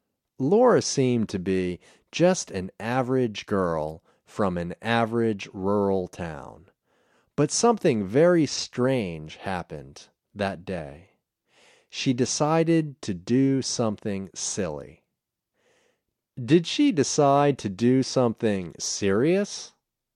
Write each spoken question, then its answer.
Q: Did she decide to do something serious?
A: No, she didn't decide to do something serious.